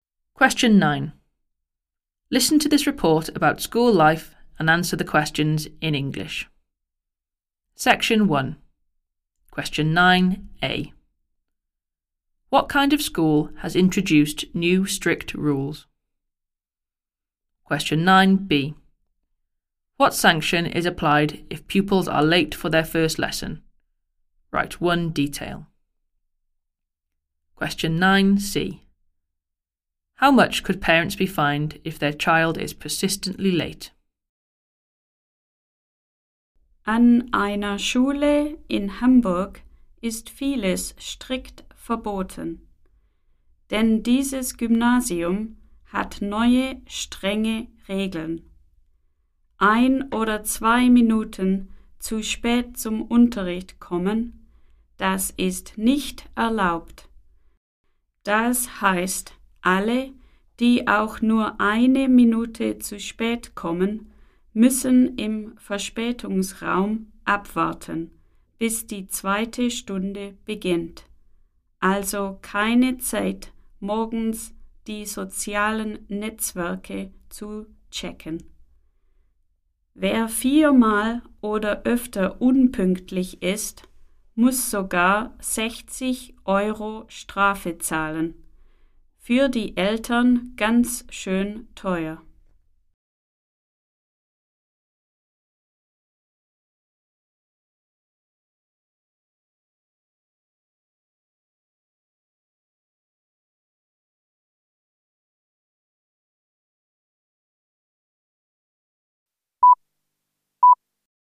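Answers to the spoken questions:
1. A grammar school (Gymnasium) in Hamburg
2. They must wait in the late room until the second lesson starts
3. 60 euros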